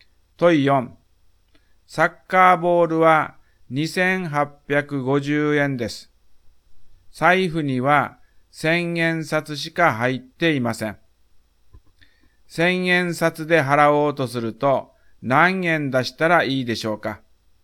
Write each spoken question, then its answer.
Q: 1000円札で払おうとすると何円出したらいいでしょうか?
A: 3000円出してお釣りをもらいます。